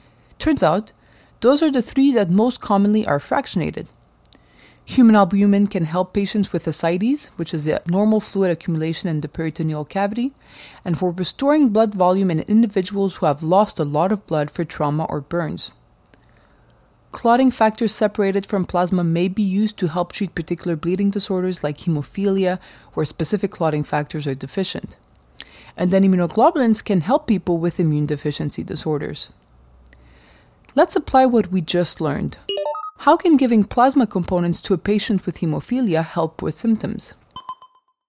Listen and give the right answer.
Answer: Giving plasma components to a patient with hemophilia provides clotting factors that are deficient in hemophilia.